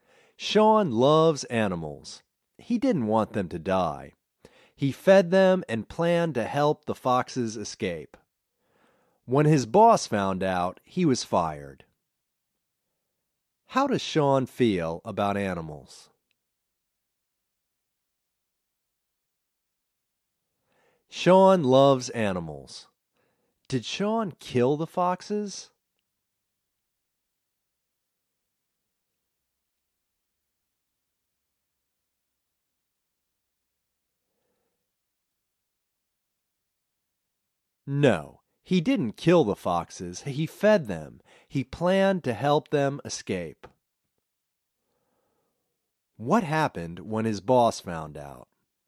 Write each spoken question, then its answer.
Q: What happened when his boss found out?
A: When his boss found out, he was fired.